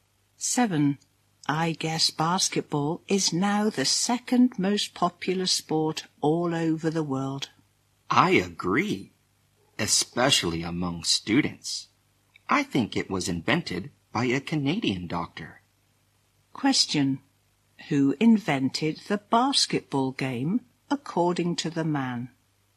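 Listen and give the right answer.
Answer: A Canadian doctor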